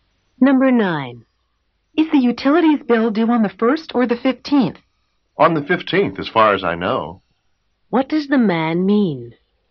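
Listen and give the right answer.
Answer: He thinks the bill is due on the 15th, but he isn't sure.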